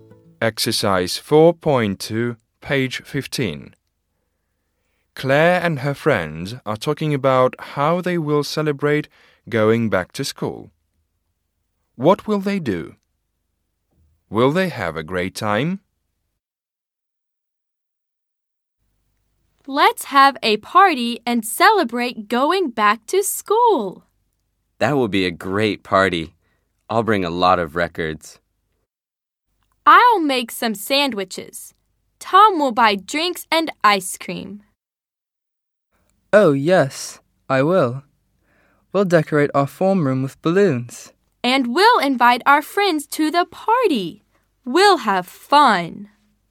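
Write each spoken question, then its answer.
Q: What will they do?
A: Have a party to celebrate going back to school

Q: Will they have a great time?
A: Yes, they'll have fun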